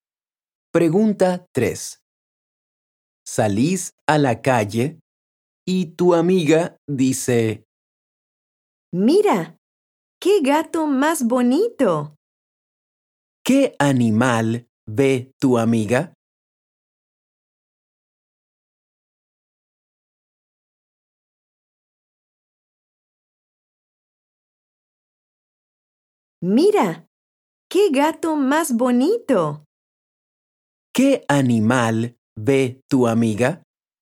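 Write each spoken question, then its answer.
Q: ¿Qué animal ve tu amiga?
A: un gato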